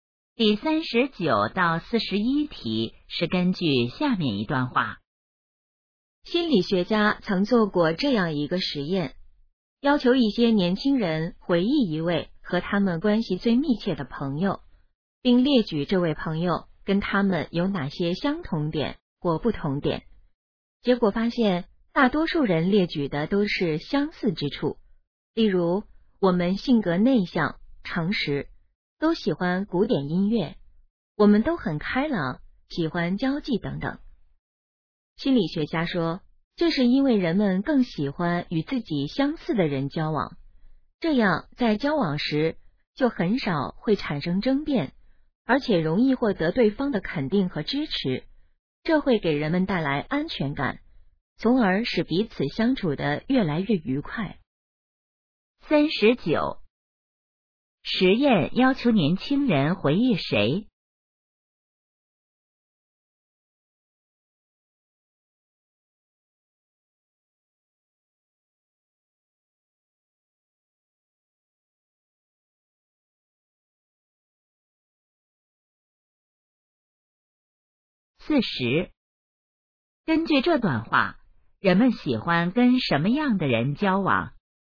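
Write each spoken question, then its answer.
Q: 实验要求年轻人回忆谁?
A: 和他们关系最密切的朋友

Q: 根据这段话,人们喜欢跟什么样的人交往?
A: 与自己相似的人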